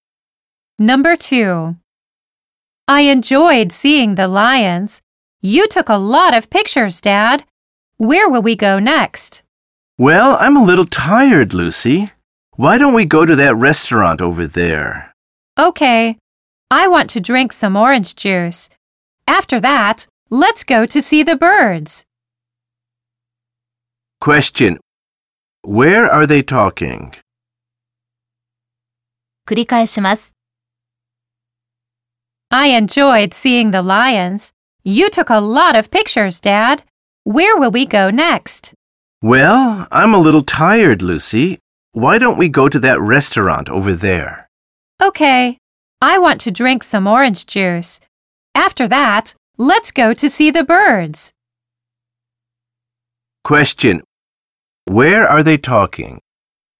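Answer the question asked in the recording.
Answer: At a zoo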